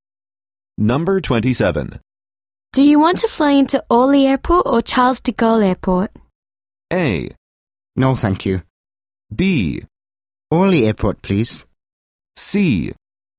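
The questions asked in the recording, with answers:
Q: Do you want to fly into Orly Airport or Charles de Gaulle Airport?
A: B: Orly Airport, please.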